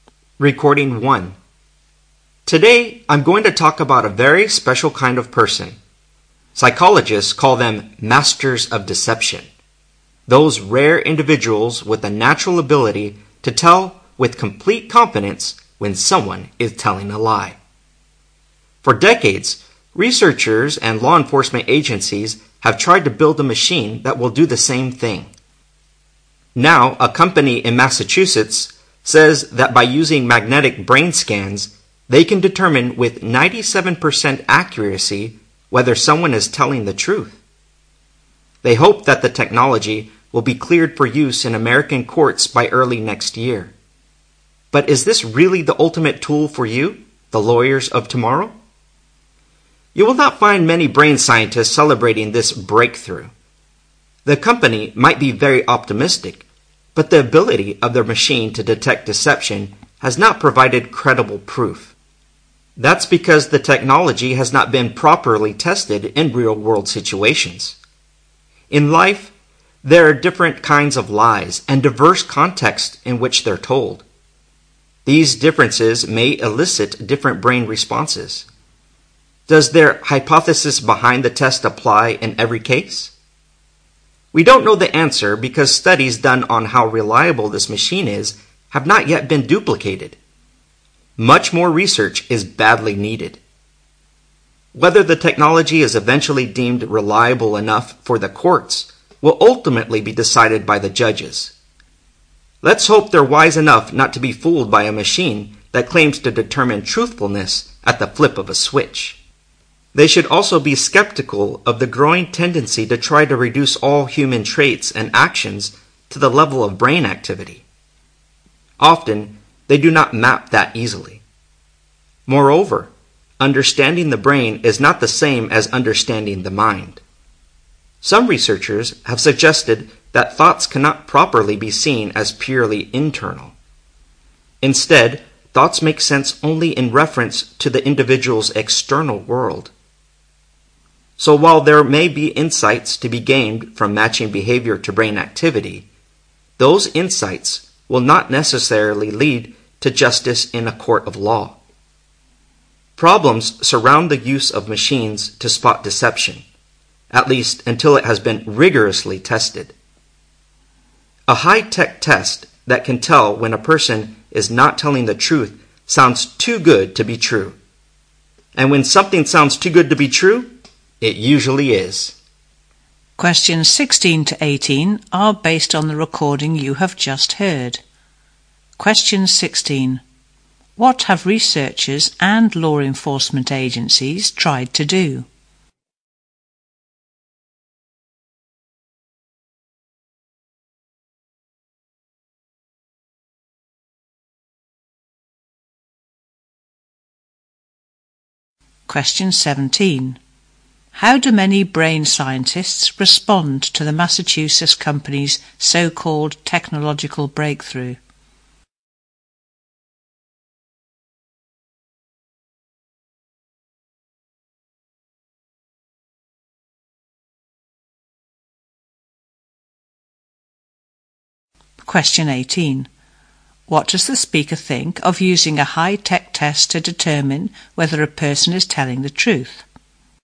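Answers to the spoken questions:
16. Build a machine that detects lies
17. They are skeptical; it lacks credible proof
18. It sounds too good to be true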